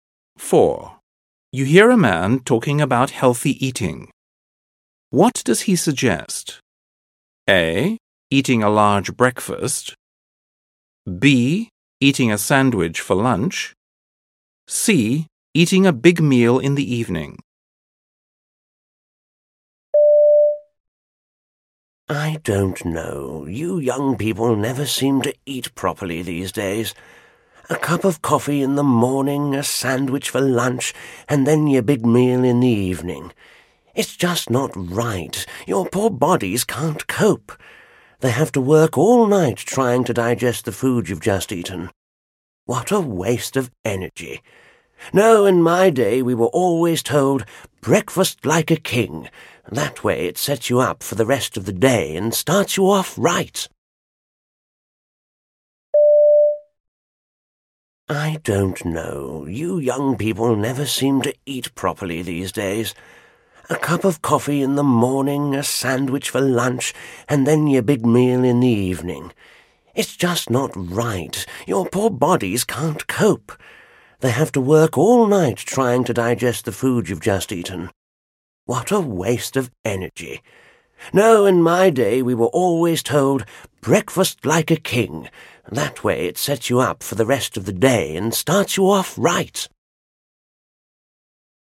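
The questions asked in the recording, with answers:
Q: What does he suggest?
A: A: Eating a large breakfast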